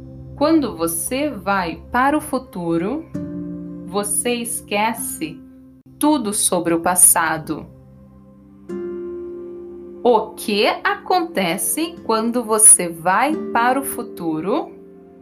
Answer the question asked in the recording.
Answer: você esquece tudo sobre o passado.